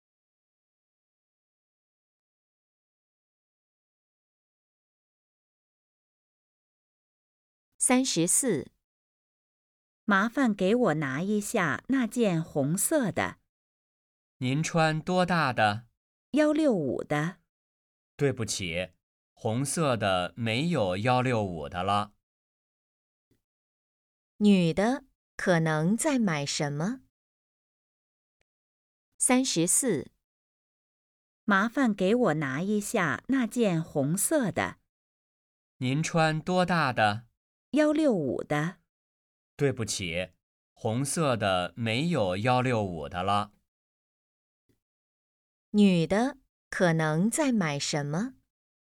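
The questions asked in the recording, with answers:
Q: 女的可能在买什么?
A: 衣服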